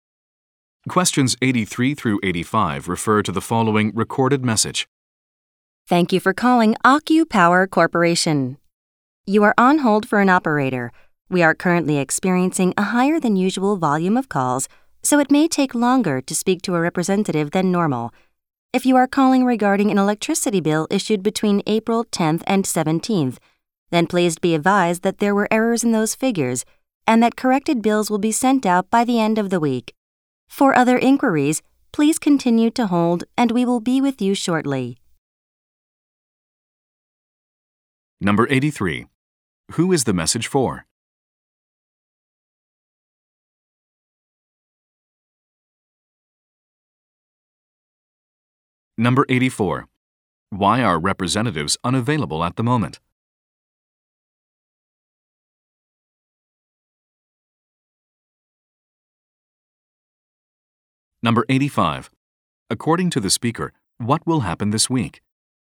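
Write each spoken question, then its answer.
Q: Who is the message for?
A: People calling AccuPower Corporation who are on hold

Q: Why are representatives unavailable at the moment?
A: There is a higher than usual volume of calls

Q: According to the speaker, what will happen this week?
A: Corrected electricity bills will be sent out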